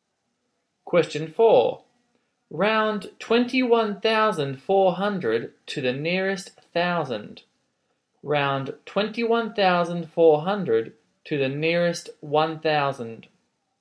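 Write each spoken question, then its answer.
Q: Round 21,400 to the nearest thousand.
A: 21000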